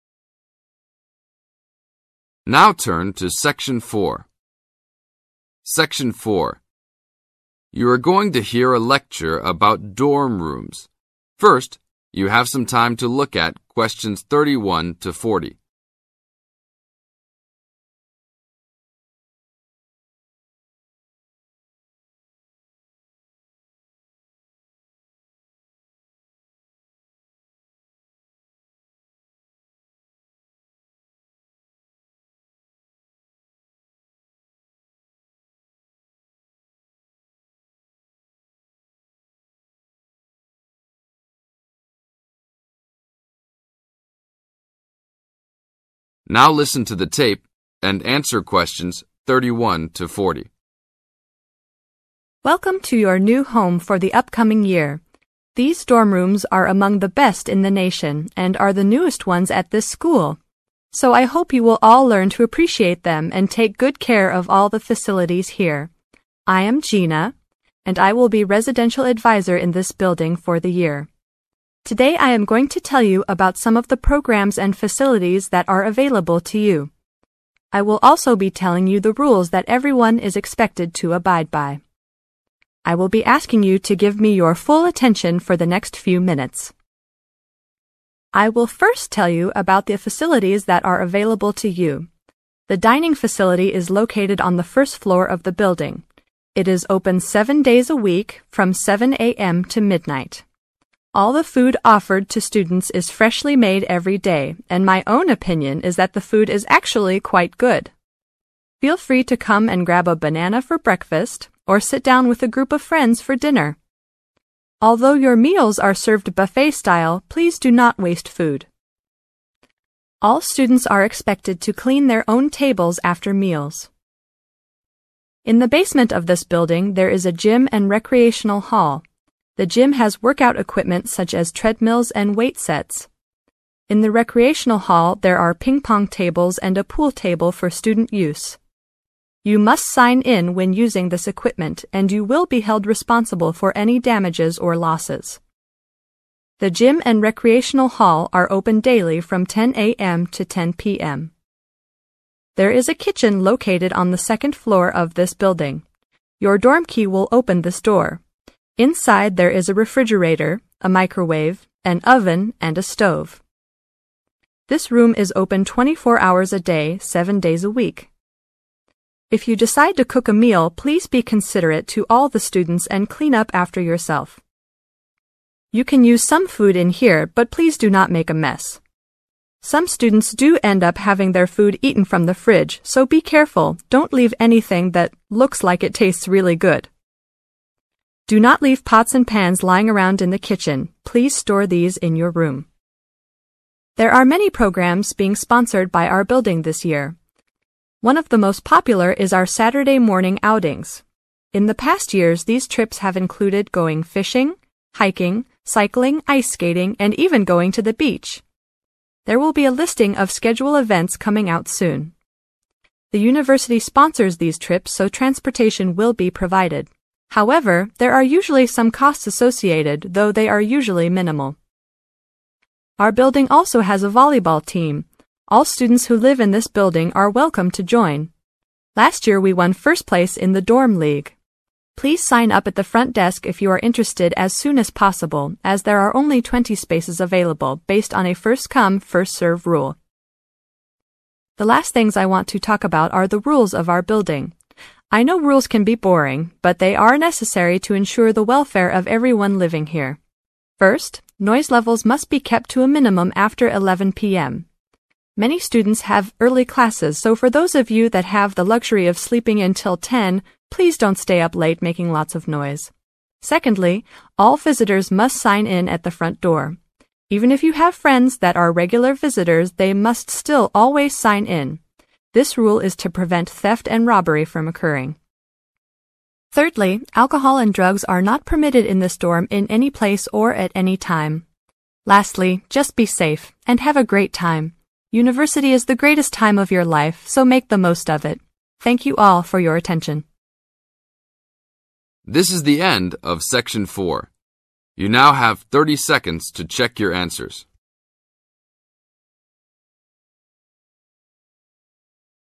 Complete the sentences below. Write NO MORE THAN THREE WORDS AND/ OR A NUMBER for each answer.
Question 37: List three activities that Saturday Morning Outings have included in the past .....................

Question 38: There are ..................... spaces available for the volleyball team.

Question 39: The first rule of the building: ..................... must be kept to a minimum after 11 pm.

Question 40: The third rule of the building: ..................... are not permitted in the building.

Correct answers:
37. fishing, hiking, cycling
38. 20
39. noise levels
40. alcohol and drugs